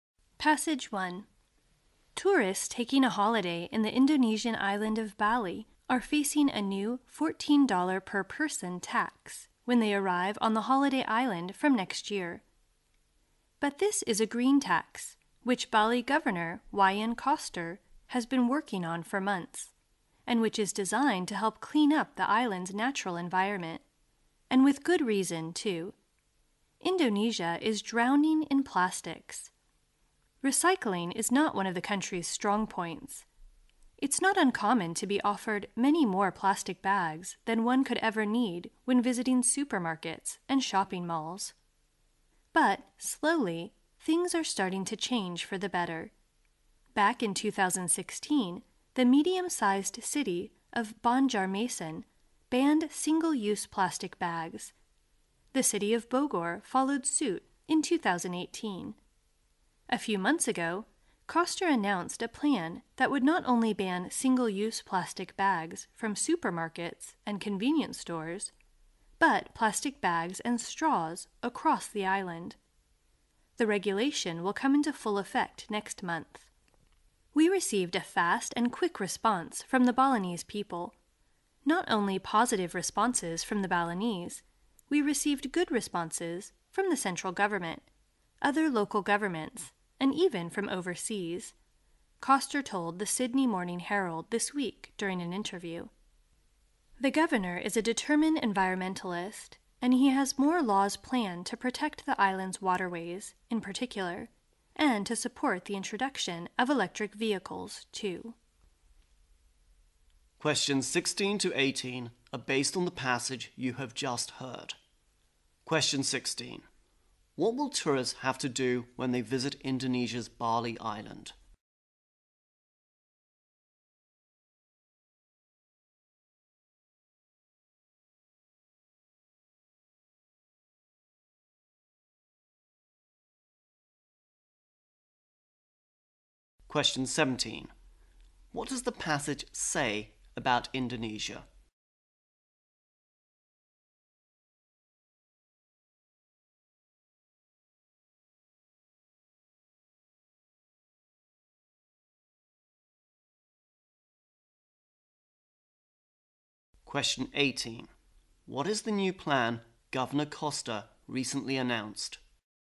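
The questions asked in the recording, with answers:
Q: What will tourists have to do when they visit Indonesia's Bali Island?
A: Pay a $14 green tax

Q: What does the passage say about Indonesia?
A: It is drowning in plastics

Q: What is the new plan Governor Koster recently announced?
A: To ban single-use plastic bags and straws across the island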